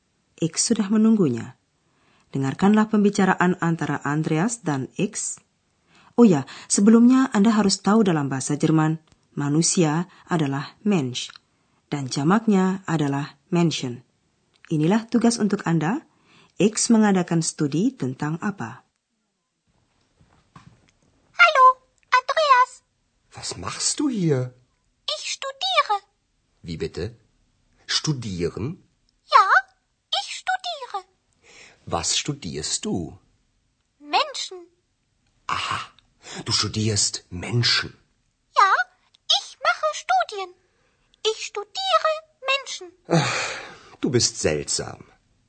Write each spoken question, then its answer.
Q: X mengadakan studi tentang apa?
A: Jadi, X mempelajari perilaku manusia.